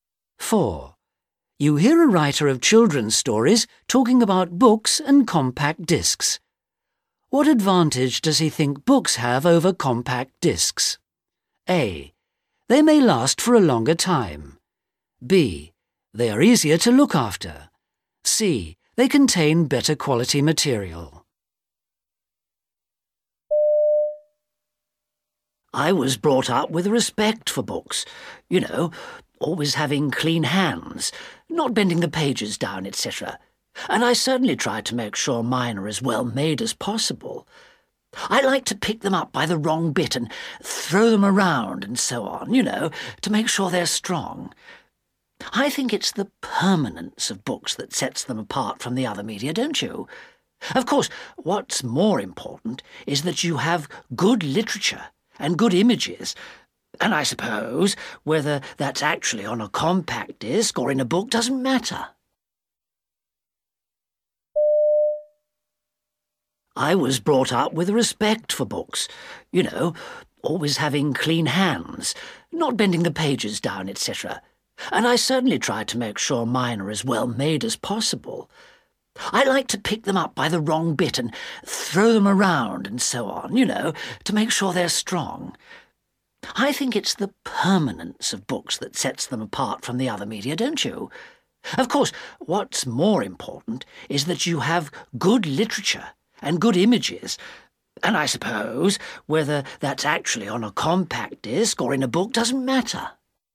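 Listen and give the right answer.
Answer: A: They may last for a longer time.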